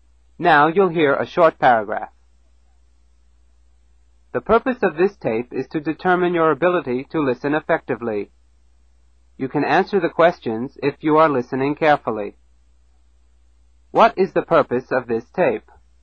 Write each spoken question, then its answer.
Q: What is the purpose of this tape?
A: To test my ability to listen.